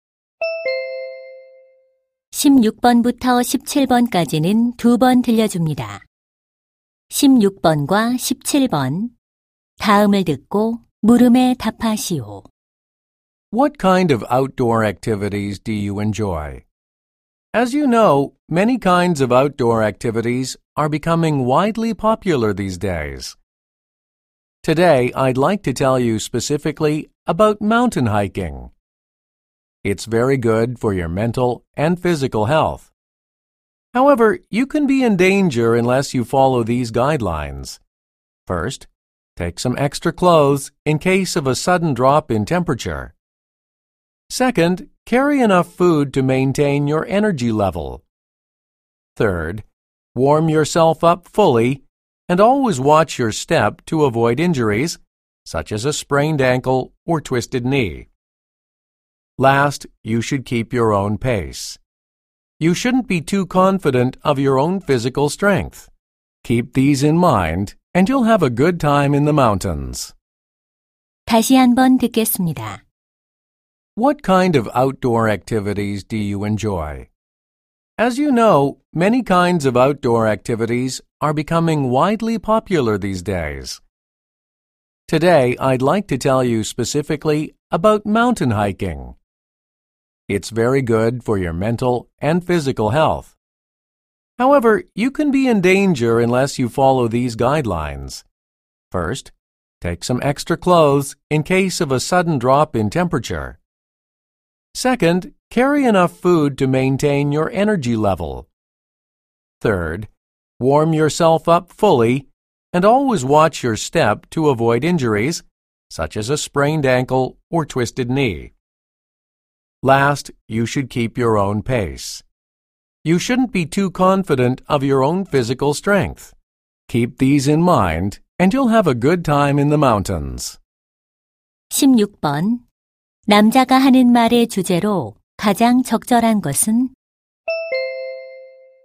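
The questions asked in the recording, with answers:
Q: 남자가 하는 말의 주제로 가장 적절한 것은?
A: 안전한 등산을 위한 수칙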